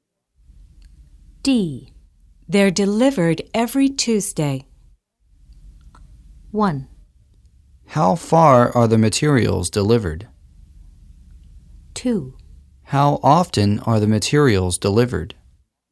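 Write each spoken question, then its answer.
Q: They're delivered every Tuesday.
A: 2: How often are the materials delivered?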